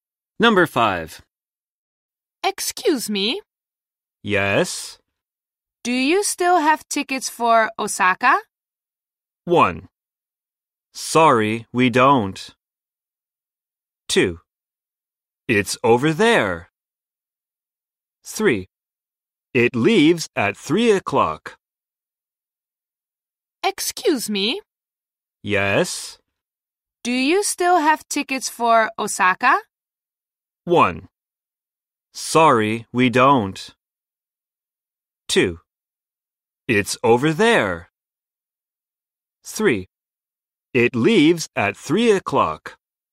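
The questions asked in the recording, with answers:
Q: Do you still have tickets for Osaka?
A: 1: Sorry, we don't.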